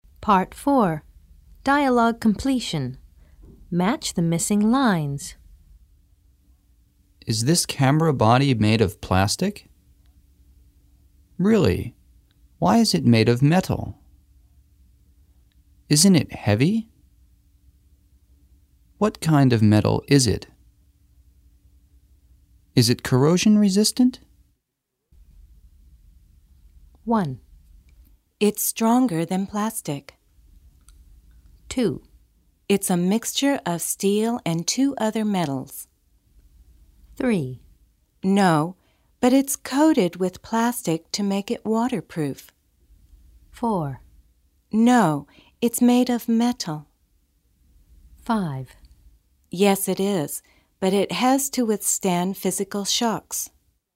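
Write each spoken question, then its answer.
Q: Is this camera body made of plastic?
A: 4: No, it's made of metal.

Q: Really? Why is it made of metal?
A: 1: It's stronger than plastic.

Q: Isn't it heavy?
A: 5: Yes, it is, but it has to withstand physical shocks.

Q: What kind of metal is it?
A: 2: It's a mixture of steel and two other metals.

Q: Is it corrosion resistant?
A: 3: No, but it's coated with plastic to make it waterproof.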